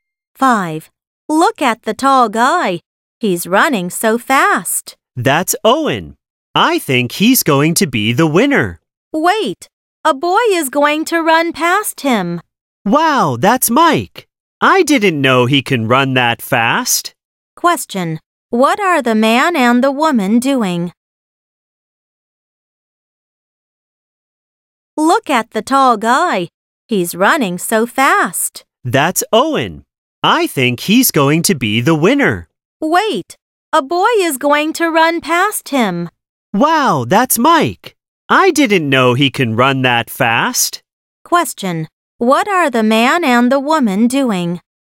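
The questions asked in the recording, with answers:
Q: Question, what are the man and the woman doing?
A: Watching a running race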